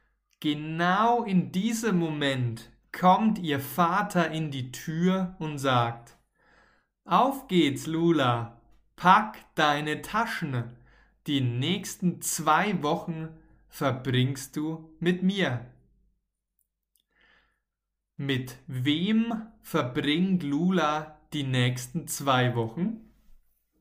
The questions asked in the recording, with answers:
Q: Mit wem verbringt Lula die nächsten zwei Wochen?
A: Mhm. mit ihrem Papa.